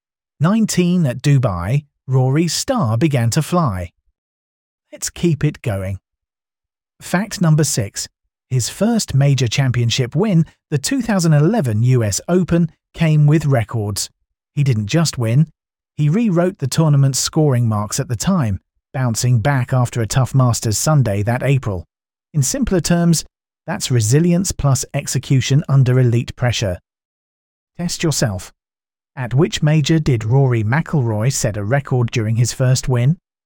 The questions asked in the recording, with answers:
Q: At which major did Rory McIlroy set a record during his first win?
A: Correct answer, the 2011 US Open.